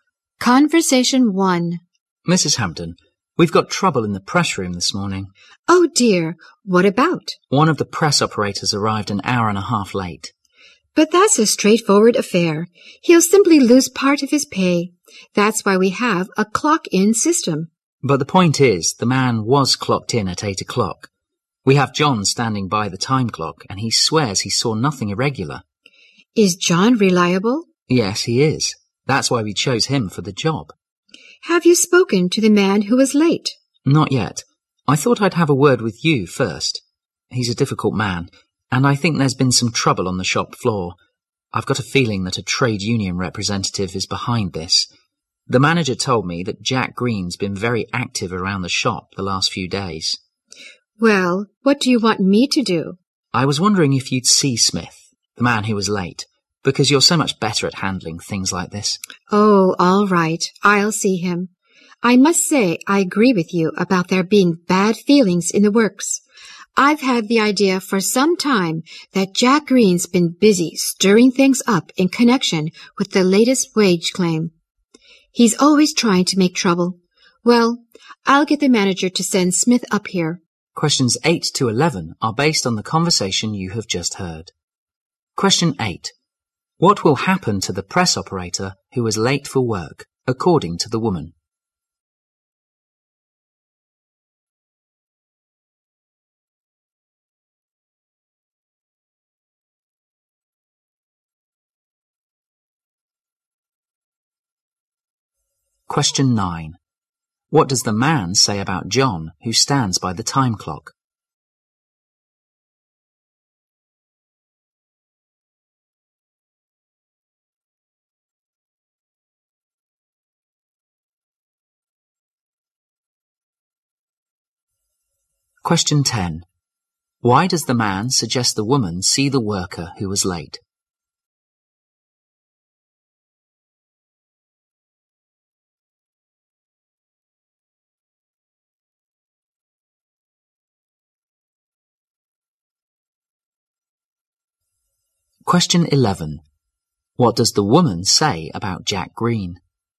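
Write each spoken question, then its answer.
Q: What will happen to the press operator who was late for work, according to the woman?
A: He will lose part of his pay

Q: What does the man say about John, who stands by the time clock?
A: He is reliable

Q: Why does the man suggest the woman see the worker who was late?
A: She is better at handling such things

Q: What does the woman say about Jack Green?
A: He is always trying to make trouble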